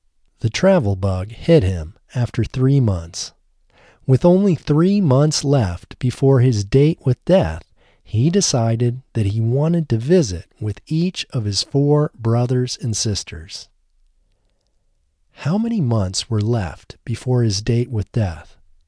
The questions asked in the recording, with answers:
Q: How many months were left before his date with death?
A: Only 3 months were left before his date with death.